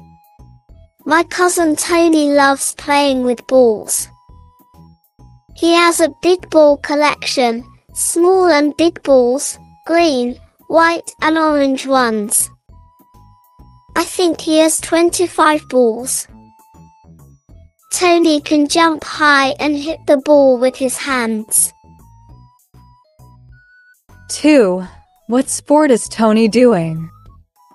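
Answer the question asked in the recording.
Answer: volleyball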